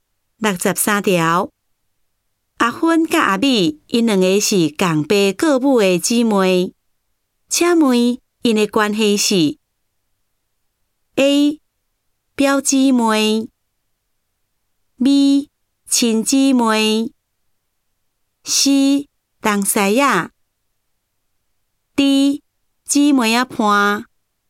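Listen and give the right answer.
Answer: B: 亲姊妹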